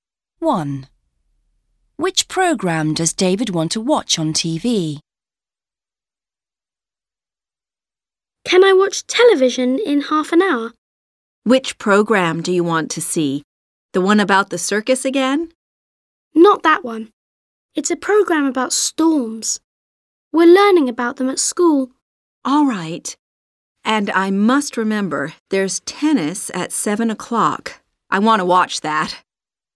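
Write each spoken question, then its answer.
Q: Which program does David want to watch on TV?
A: A program about storms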